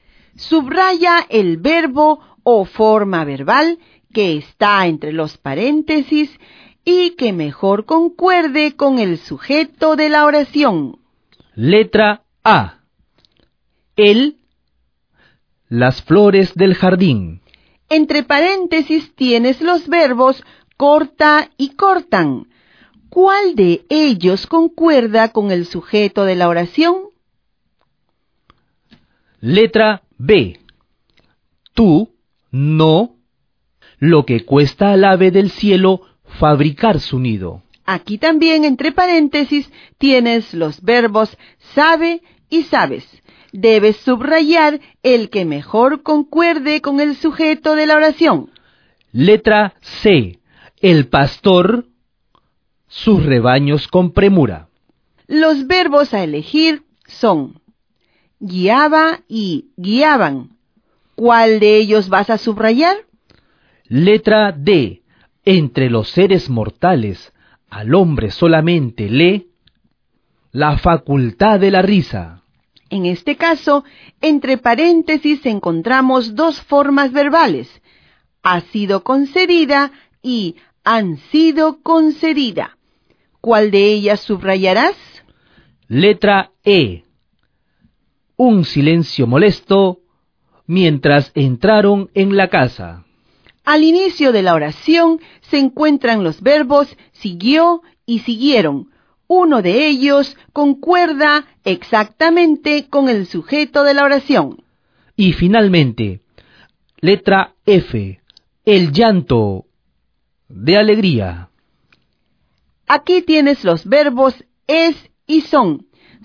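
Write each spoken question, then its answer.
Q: Letra B. Tú, no, lo que cuesta al ave del cielo fabricar su nido.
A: sabes

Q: Letra C. El pastor, sus rebaños con premura.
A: guiaba

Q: Letra D. Entre los seres mortales, al hombre solamente le...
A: ha sido concedida

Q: Letra E. Un silencio molesto mientras entraron en la casa.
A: siguió

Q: Y finalmente, letra F, el llanto de alegría.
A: es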